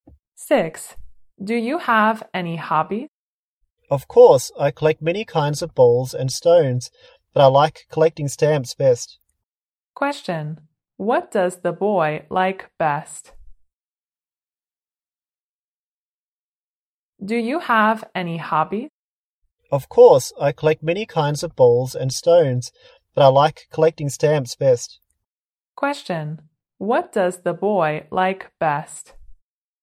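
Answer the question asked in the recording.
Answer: Collecting stamps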